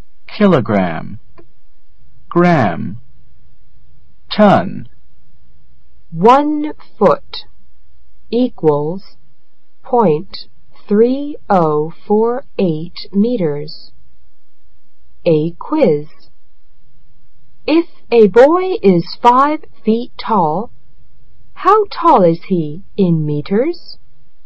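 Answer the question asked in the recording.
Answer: About 1.524 meters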